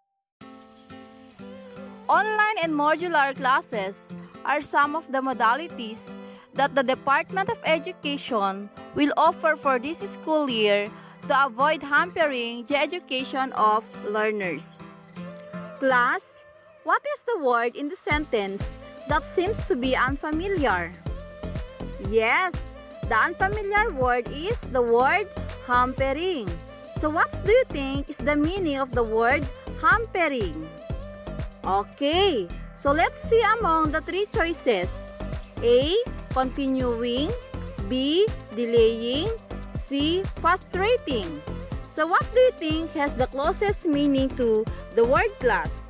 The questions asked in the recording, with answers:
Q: So what do you think is the meaning of the word hampering?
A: If your answer is delaying, you got it right.